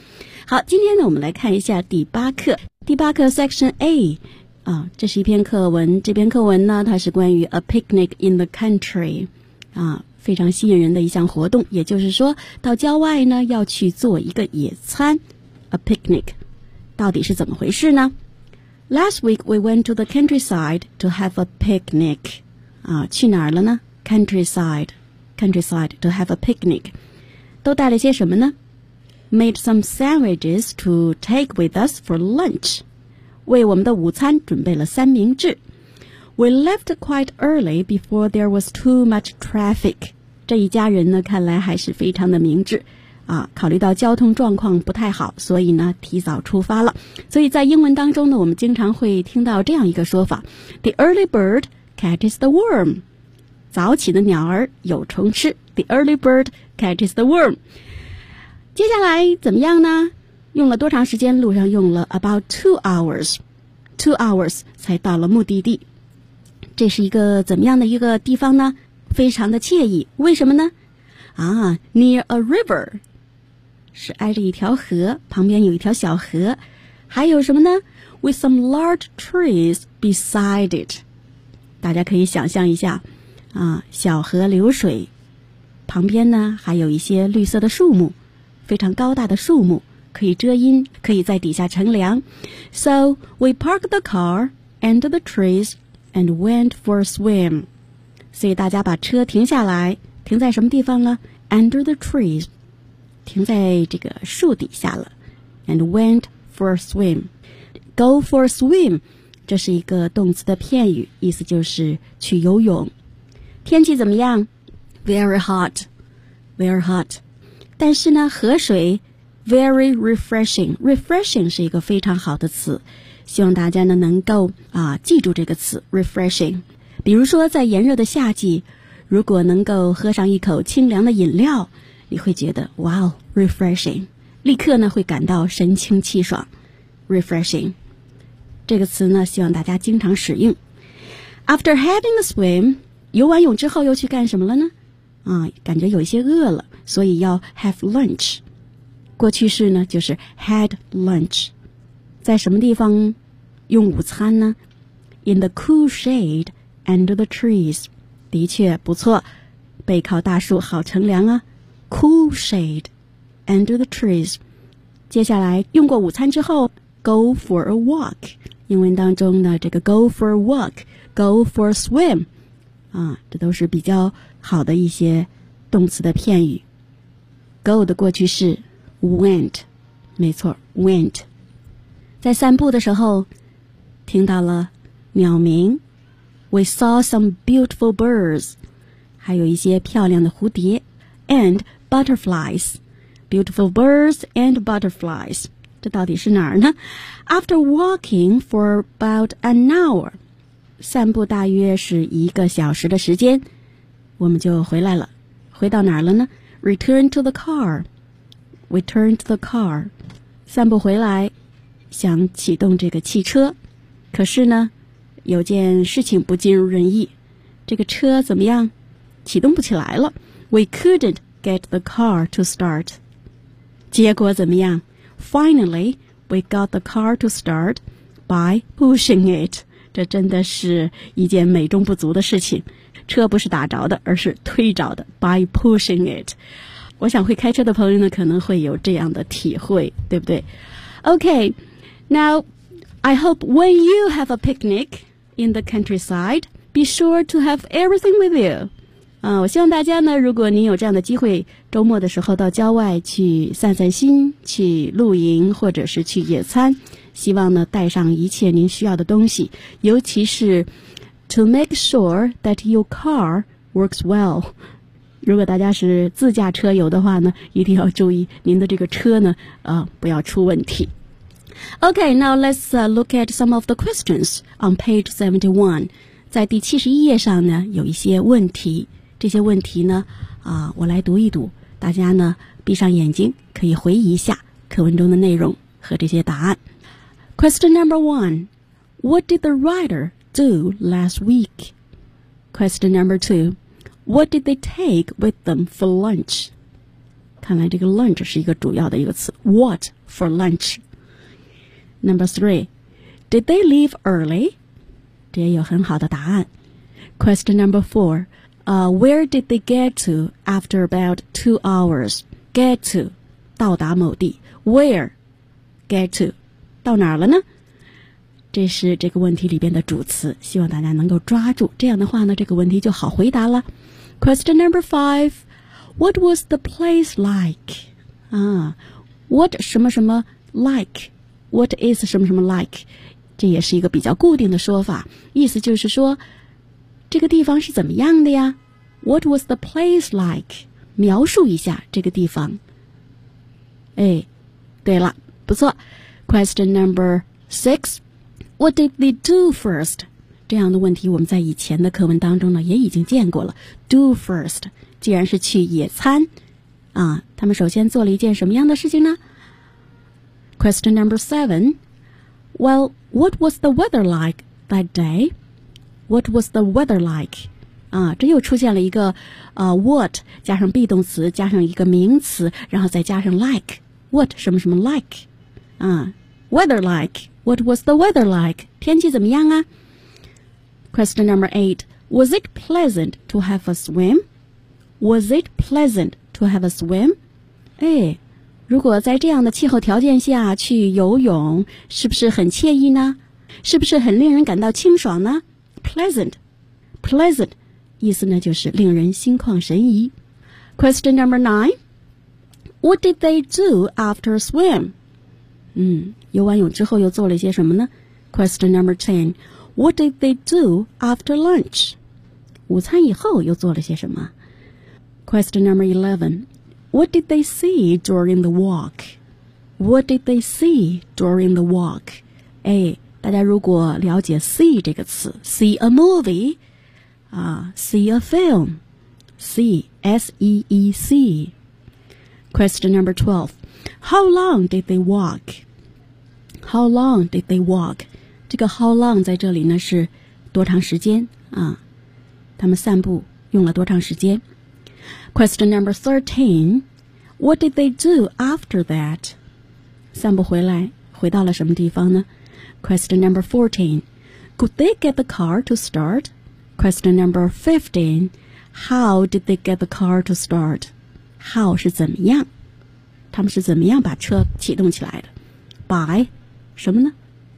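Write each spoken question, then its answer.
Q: what did the writer do last week?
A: They went to the countryside to have a picnic.

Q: what did they take with them for lunch?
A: Sandwiches.

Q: did they leave early?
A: Yes, they left quite early, before there was too much traffic.

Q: where did they get to after about 2 hours?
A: A nice place near a river with some large trees beside it.

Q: what was the place like?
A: It was nice, near a river with some large trees beside it.

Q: What did they do first?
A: They parked the car under the trees and went for a swim.

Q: Well, what was the weather like that day?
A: It was very hot.

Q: was it pleasant to have a swim?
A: Yes, the water was very refreshing.

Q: What did they do after swim?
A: They had lunch in the cool shade under the trees.

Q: What did they do after lunch?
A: They went for a walk.

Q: What did they see during the walk?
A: Some beautiful birds and butterflies.

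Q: How long did they walk?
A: About an hour.

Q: What did they do after that?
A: They returned to the car.

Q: Could they get the car to start?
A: No, they couldn't at first.

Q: how did they get the car to start?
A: 对了 ,pushing it.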